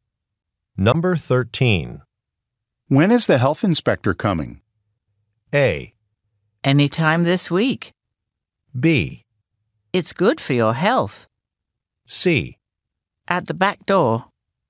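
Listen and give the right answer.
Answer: A: Anytime this week.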